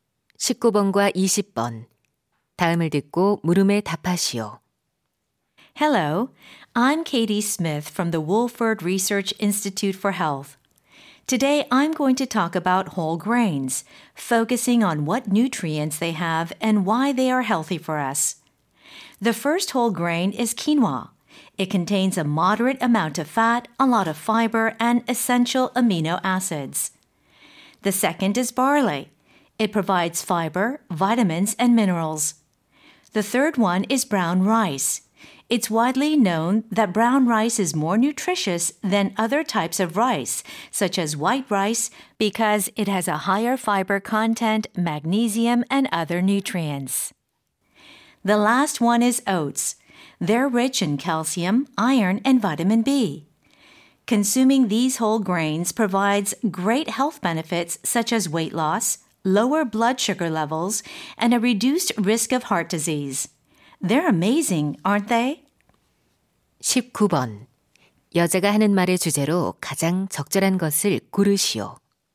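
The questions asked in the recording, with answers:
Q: 여자가 하는 말의 주제로 가장 적절한 것을 고르시오.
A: 통곡물의 영양소와 건강상의 이점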